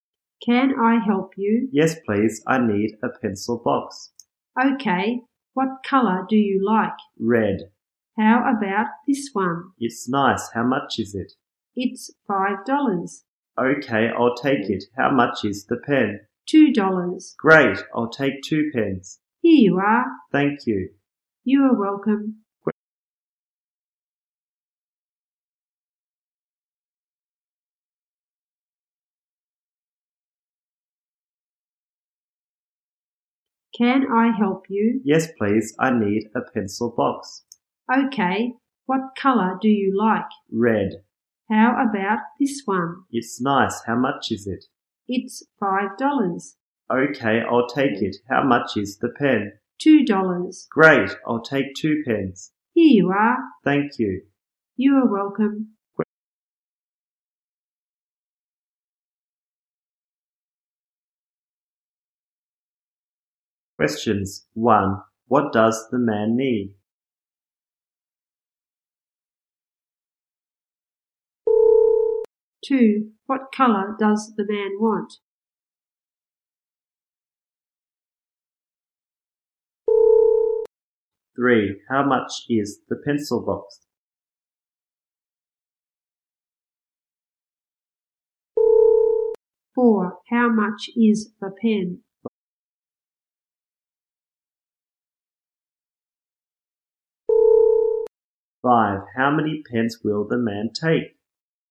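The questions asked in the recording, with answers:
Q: What does the man need?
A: A pencil box

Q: What colour does the man want?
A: Red

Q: How many pens will the man take?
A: Two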